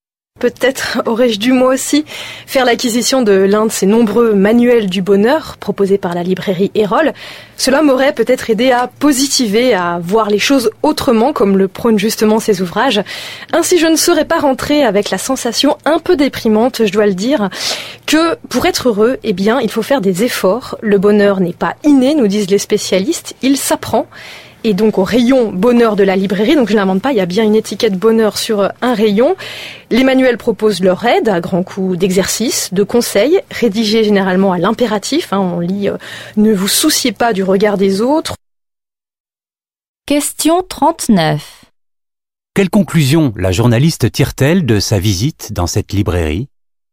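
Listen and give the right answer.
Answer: Que pour être heureux, il faut faire des efforts : le bonheur n'est pas inné, il s'apprend.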